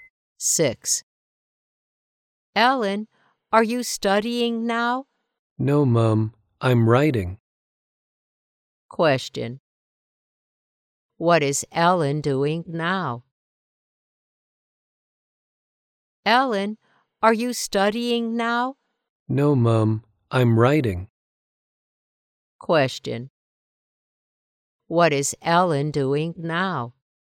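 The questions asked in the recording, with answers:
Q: What is Ellen doing now?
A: She is writing.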